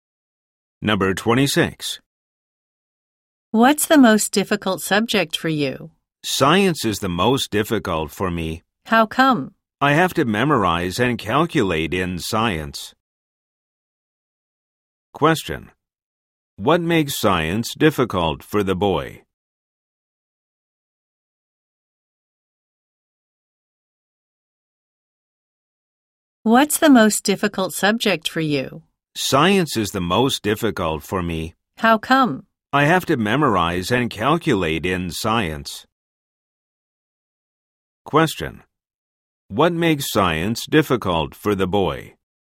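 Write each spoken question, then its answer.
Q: What makes science difficult for the boy?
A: He has to memorize and calculate.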